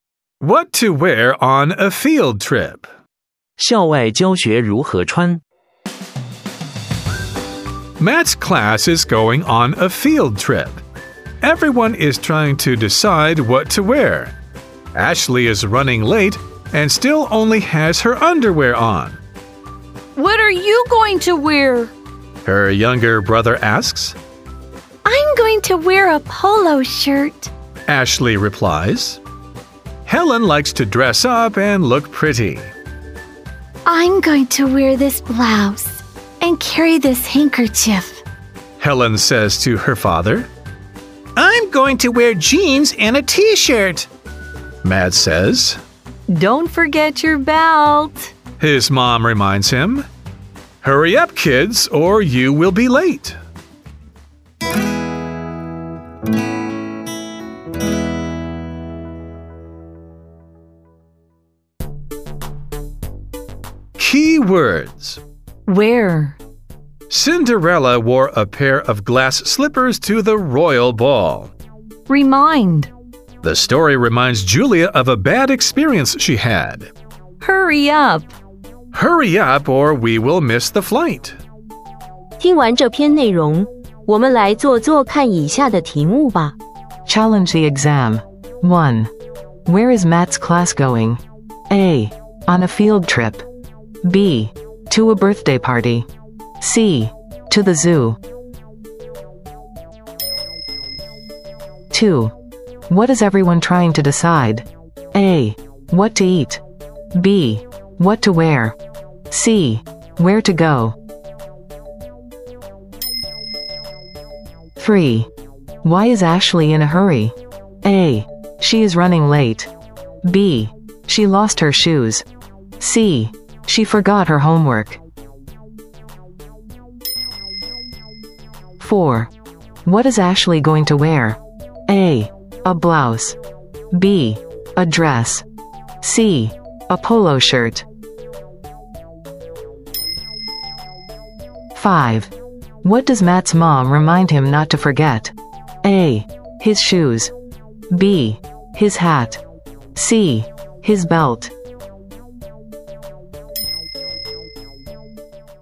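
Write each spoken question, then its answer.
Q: Where is Matt's class going?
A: A: On a field trip.

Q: What is everyone trying to decide?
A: B: What to wear.

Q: Why is Ashley in a hurry?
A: A: She is running late.

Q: What is Ashley going to wear?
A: C: A polo shirt.

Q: What does Matt's mom remind him not to forget?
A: C: His belt.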